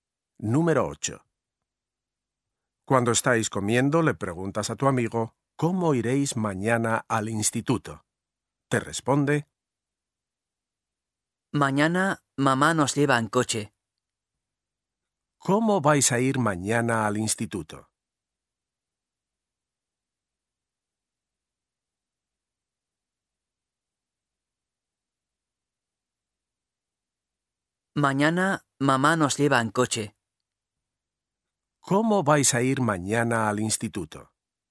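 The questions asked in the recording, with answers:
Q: ¿Cómo vais a ir mañana al instituto?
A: En coche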